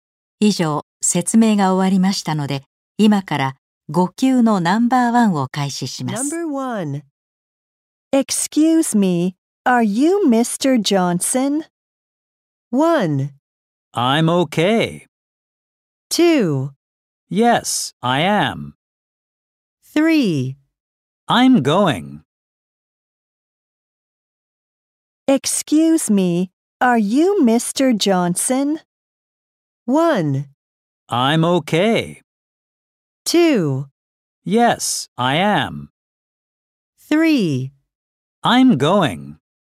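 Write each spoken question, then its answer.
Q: Excuse me, are you Mr. Johnson?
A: 2: Yes, I am.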